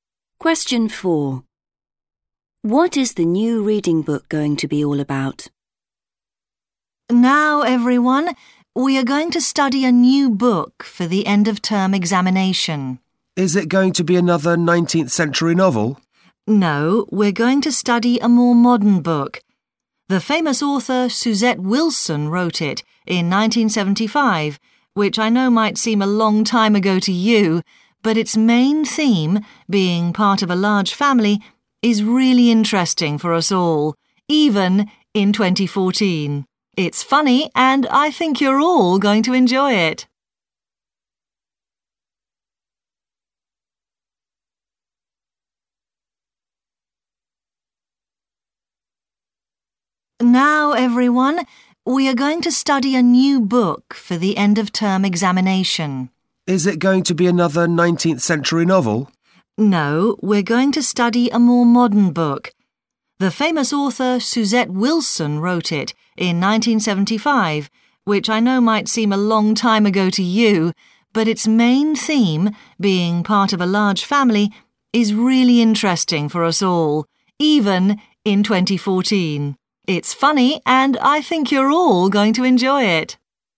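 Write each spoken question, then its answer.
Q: What is the new reading book going to be all about?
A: Being part of a large family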